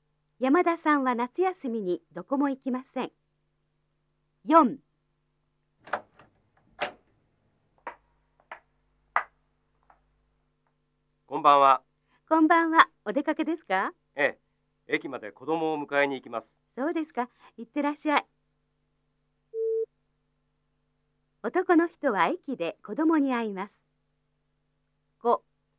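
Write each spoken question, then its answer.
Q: 男の人は駅で子供に会います。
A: 正しい(○)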